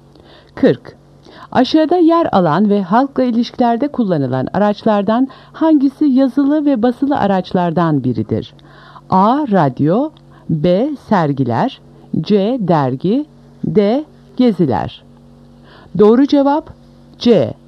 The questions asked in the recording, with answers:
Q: Aşağıda yer alan ve halkla ilişkilerde kullanılan araçlardan hangisi yazılı ve basılı araçlardan biridir?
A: Doğru cevap C. Dergi.